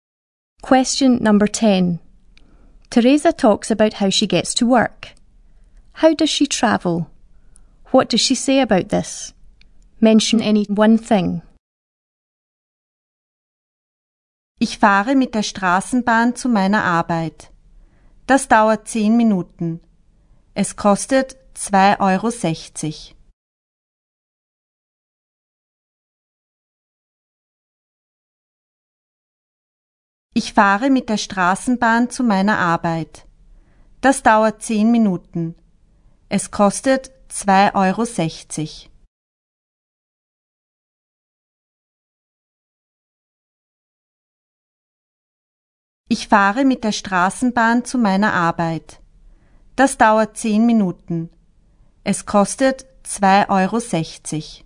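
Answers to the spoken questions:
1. By tram
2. It takes 10 minutes and costs 2.60 euros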